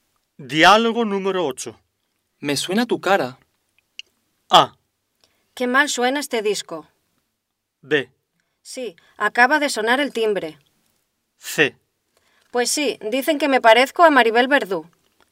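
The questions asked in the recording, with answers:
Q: Me suena tu cara.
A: C: Pues sí, dicen que me parezco a Maribel Verdú.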